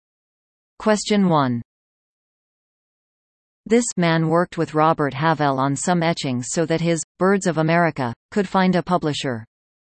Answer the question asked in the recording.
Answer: The answer is John James Audubon.